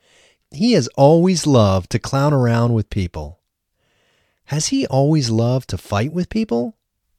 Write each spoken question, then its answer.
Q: Has he always loved to fight with people?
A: No, he hasn't always loved to fight with people.